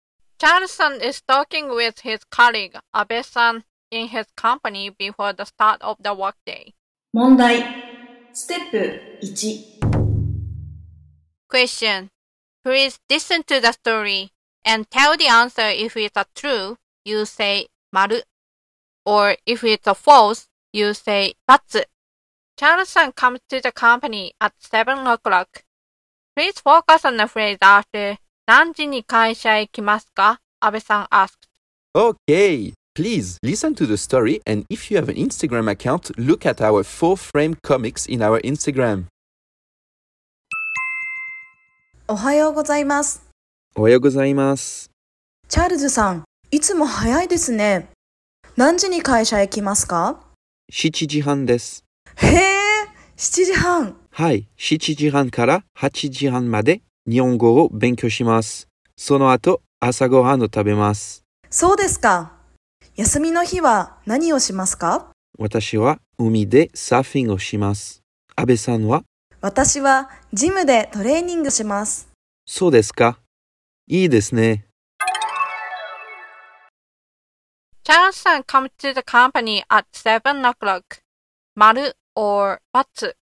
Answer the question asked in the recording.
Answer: So the answer is バツ。